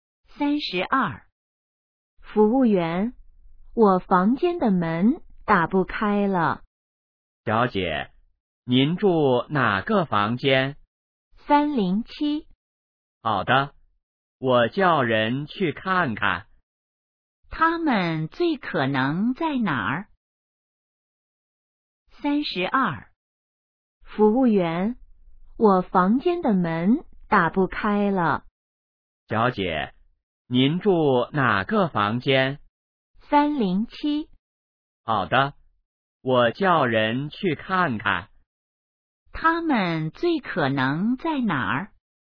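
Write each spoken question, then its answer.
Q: 他们最可能在哪儿?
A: 宾馆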